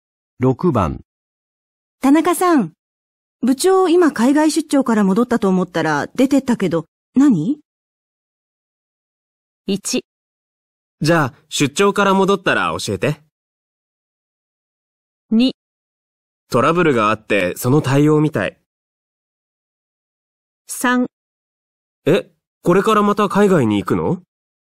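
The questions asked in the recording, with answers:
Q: 田中さん、部長今海外出張から戻ったと思ったら出てったけど、何?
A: 2: トラブルがあって、その対応みたい。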